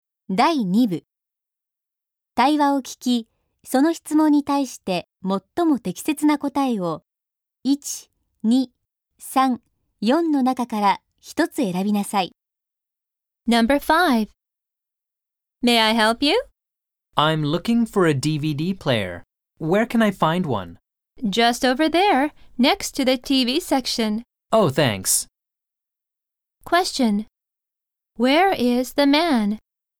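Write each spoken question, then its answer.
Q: Where is the man?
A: In an electronics store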